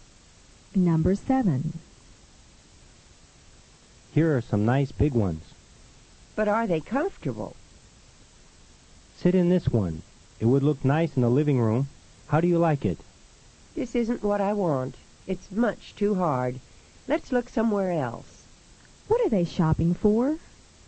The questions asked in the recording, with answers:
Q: What are they shopping for?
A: Number 7 is A. They are shopping for a comfortable chair.